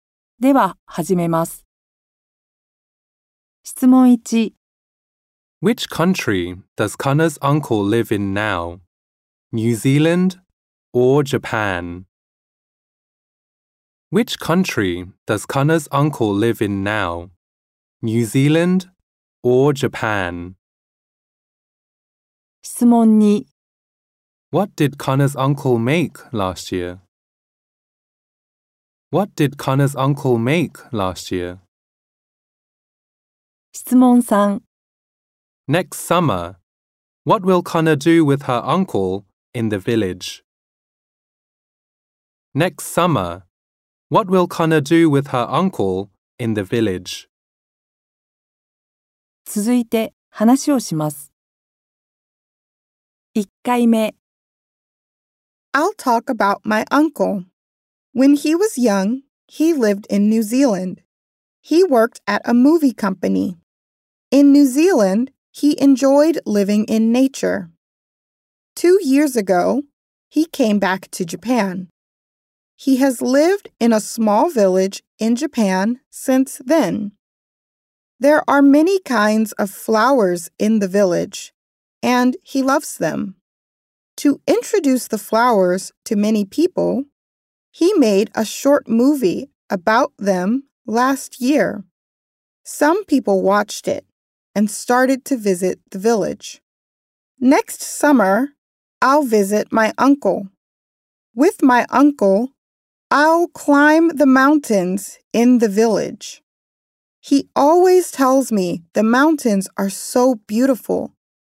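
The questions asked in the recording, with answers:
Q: Which country does Kana's uncle live in now? New Zealand or Japan?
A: Japan

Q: What did Kana's uncle make last year?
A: A short movie about the flowers in the village

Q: Next summer, what will Kana do with her uncle in the village?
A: She will climb the mountains.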